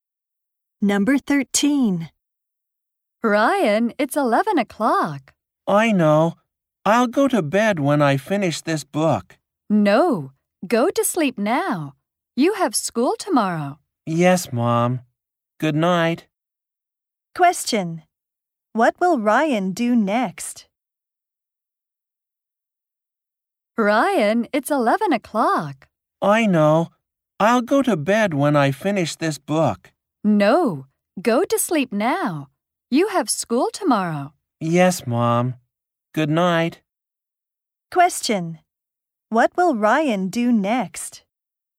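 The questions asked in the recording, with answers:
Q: What will Ryan do next?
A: Go to sleep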